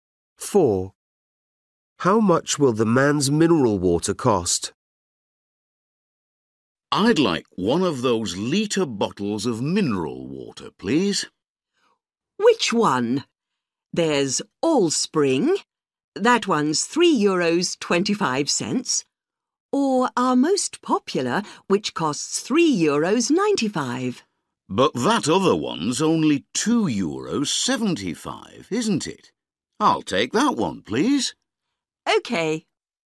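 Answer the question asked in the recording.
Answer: €2.75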